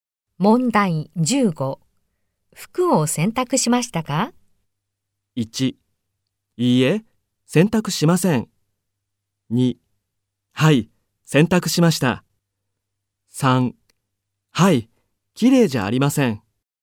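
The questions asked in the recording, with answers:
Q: 服を洗濯しましたか?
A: 1: はい、洗濯しました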